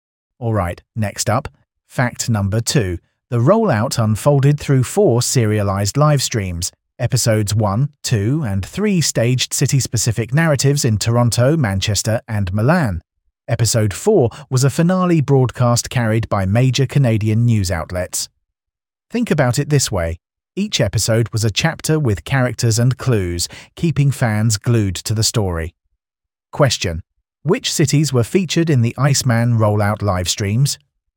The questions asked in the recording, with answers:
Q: which cities were featured in the Iceman rollout live streams?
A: Toronto, Manchester, Milan.